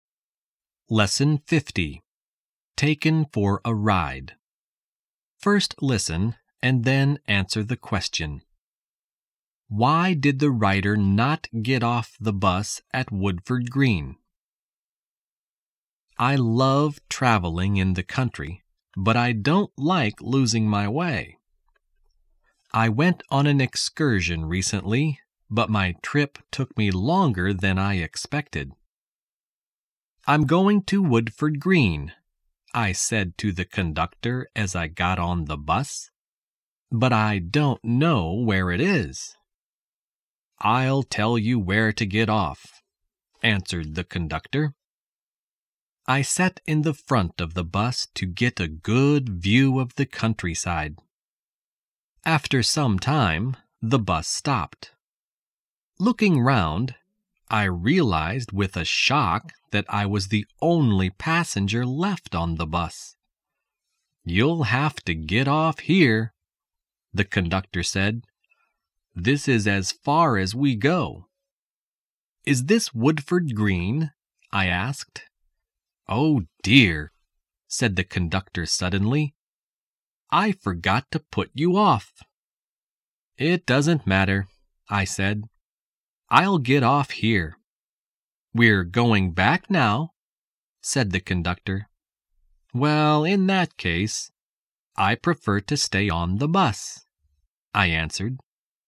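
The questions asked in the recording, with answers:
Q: Why did the writer not get off the bus at Woodford Green?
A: The conductor forgot to tell him where to get off.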